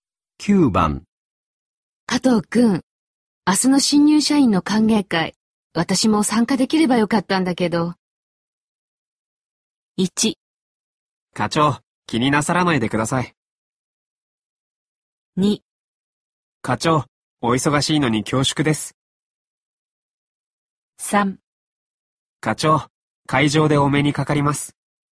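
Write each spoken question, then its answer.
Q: 加藤くん、明日の新入社員の歓迎会、私も参加できればよかったんだけど。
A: 1: 課長、気になさらないでください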